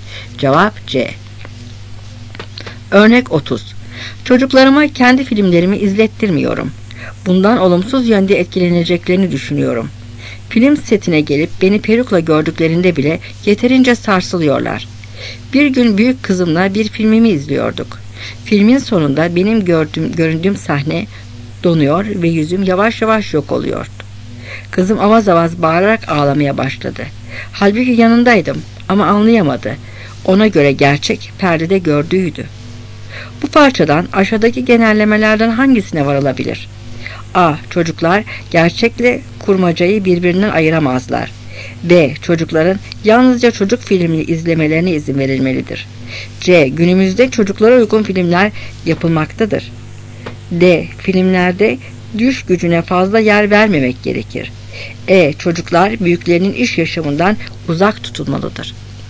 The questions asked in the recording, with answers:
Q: Bu parçadan aşağıdaki genellemelerden hangisine varılabilir?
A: Cevap A.